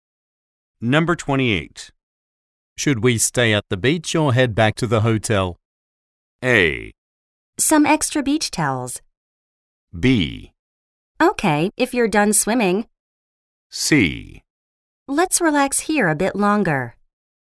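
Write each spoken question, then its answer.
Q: Should we stay at the beach or head back to the hotel?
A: C: Let's relax here a bit longer.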